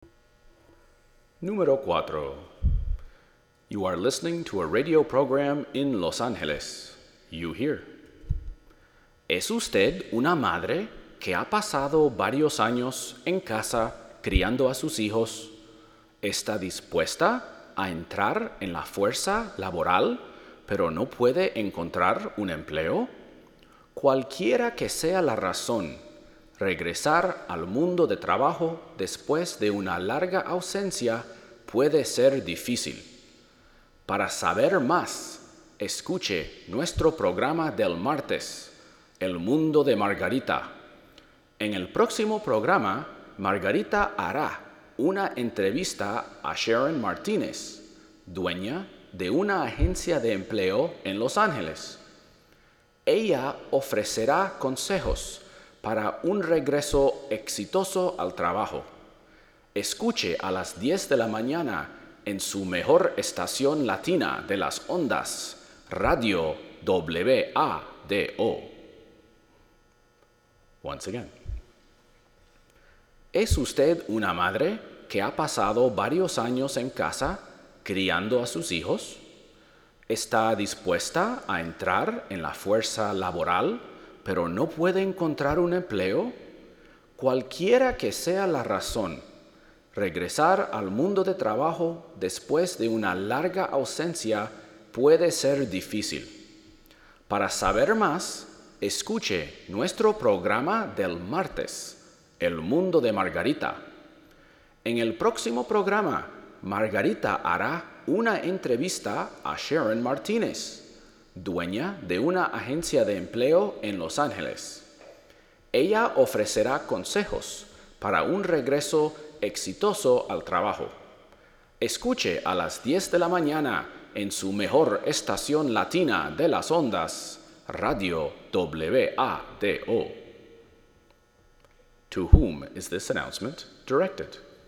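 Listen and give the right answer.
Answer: Mothers who have spent years at home raising children and want to return to work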